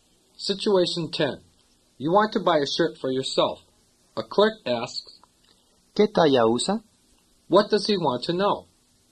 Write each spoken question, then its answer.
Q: What does he want to know?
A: What size do you wear?